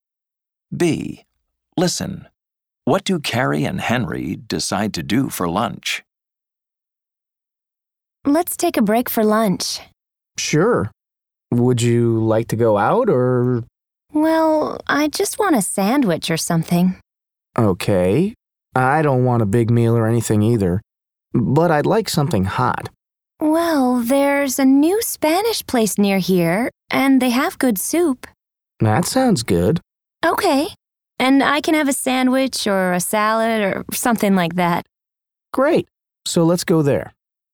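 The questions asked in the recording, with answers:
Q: What do Carrie and Henry decide to do for lunch?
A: Go to the new Spanish place nearby for soup and a sandwich or salad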